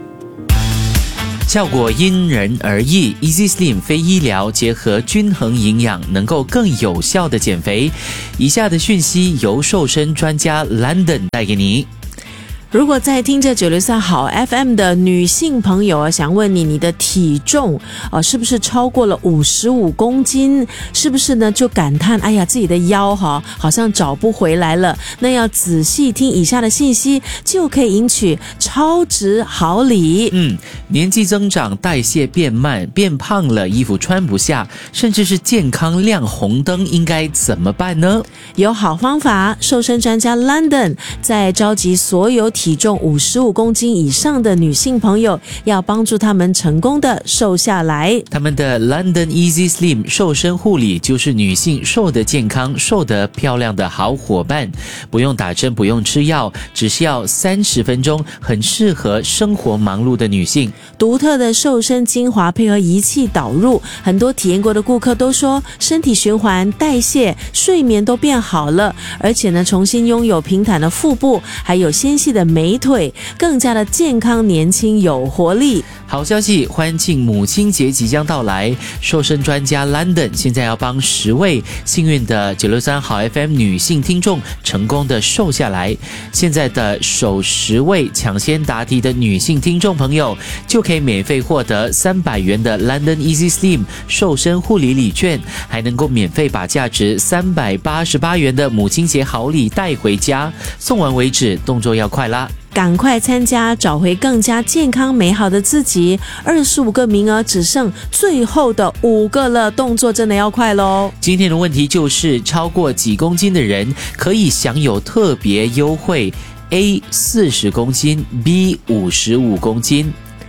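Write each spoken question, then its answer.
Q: 超过几公斤的人可以享有特别优惠? A 40公斤, B 55公斤。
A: B: 55公斤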